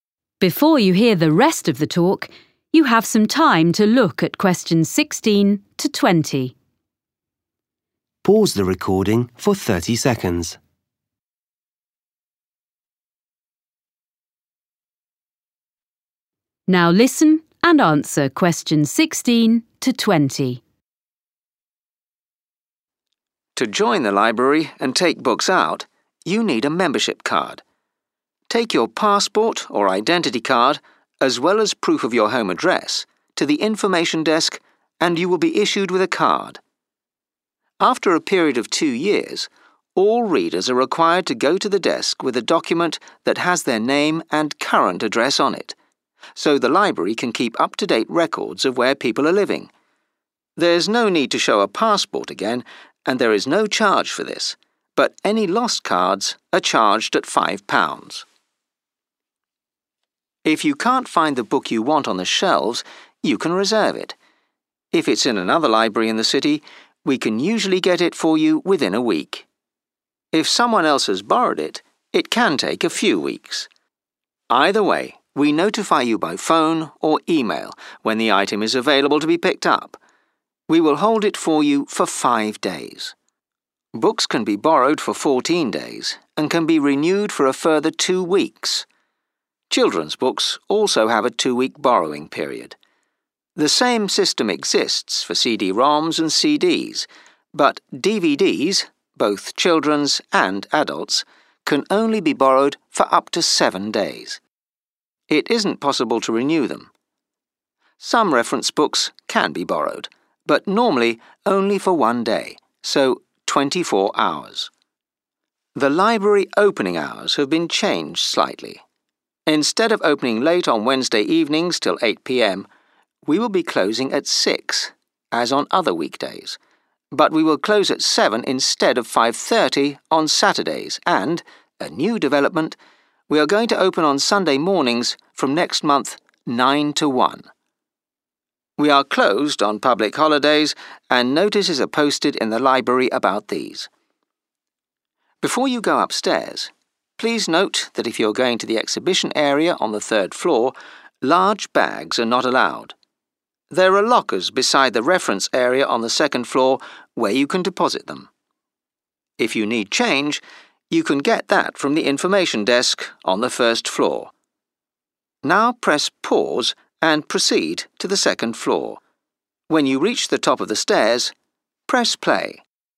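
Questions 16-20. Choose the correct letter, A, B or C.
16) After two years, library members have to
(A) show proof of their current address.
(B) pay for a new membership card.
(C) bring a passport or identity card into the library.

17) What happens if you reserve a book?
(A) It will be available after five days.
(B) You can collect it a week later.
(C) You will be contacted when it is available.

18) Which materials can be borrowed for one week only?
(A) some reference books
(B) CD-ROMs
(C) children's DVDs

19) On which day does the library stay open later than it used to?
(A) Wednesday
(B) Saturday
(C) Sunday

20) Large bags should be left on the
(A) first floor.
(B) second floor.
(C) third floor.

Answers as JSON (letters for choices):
{"16": "A", "17": "C", "18": "C", "19": "B", "20": "B"}

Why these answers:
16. After a period of two years, all readers are required to go to the desk with a document that has their name and current address on it so the library can keep up-to-date records of where people are living. 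(Cứ hai năm một lần, tất cả độc giả cần mang giấy tờ có tên và địa chỉ hiện tại của mình đến quầy lễ tân thư viện để thư viện có thể cập nhật địa chỉ hiện tại nơi họ đang sống, nhờ đó thư viện có thể cập nhật thông tin về nơi ở của mọi người.)
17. Either way, we notify you by phone or email when the item is available to be picked up. (Dù sao thì, chúng tôi cũng thông báo cho bạn qua điện thoại hoặc email khi có sẵn sách để mượn.)
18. The same system exists for CD-ROMs and CDs but DVDs, both children's and adults', can only be borrowed for up to seven days. (đĩa DVD, dành cho cả trẻ em và người lớn, chỉ có thể được mượn nhiều nhất bảy ngày.)
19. Instead of opening late on Wednesday evenings till 8pm, we will be closing at 6, as on other weekdays, but we will close at 7 instead of 5.30 on Saturdays (chúng tôi sẽ đóng cửa lúc 7 giờ thay vì 5 giờ 30 vào những ngày thứ bảy) and – a new development – we are going to open on Sunday mornings from next month – 9 to 1.
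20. Before you go upstairs, please note that if you are going to the exhibition area on the third floor, large bags are not allowed. There are lockers beside the reference area on the second floor where you can deposit them. (khi đến khu vực triển lãm trên tầng ba, bạn không được phép mang theo những chiếc túi lớn. Sẽ có tủ khóa bên cạnh khu vực sách tham khảo trên tầng hai để ký gửi.)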